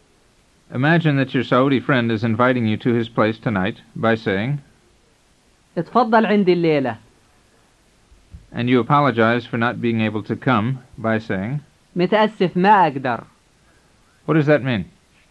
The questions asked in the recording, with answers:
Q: What does that mean?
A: It means, sorry, I can't.